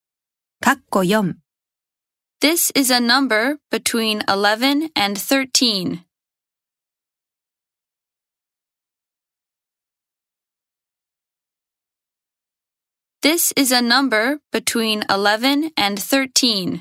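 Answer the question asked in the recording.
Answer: twelve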